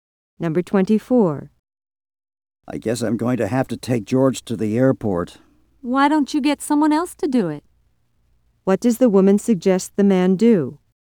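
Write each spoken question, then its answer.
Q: What does the woman suggest the man do?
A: Get someone else to take George to the airport.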